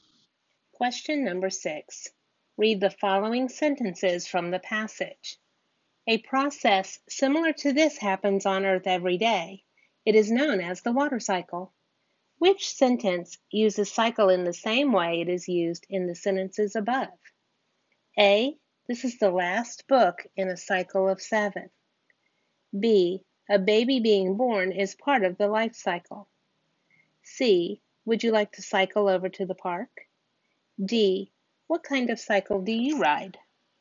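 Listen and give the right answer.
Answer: B: A baby being born is part of the life cycle.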